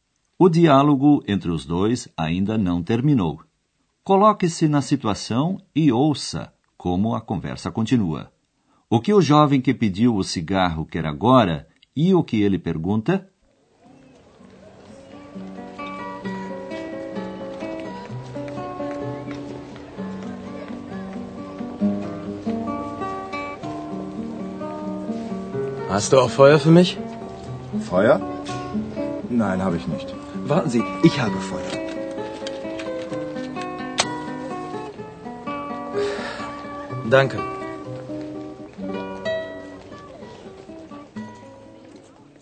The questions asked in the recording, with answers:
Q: O que o jovem que pediu o cigarro quer agora e o que ele pergunta?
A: Quem quer fumar um cigarro precisa de fogo.